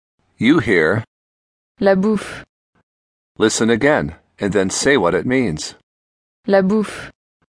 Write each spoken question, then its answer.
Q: Listen again, and then say what it means.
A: The food.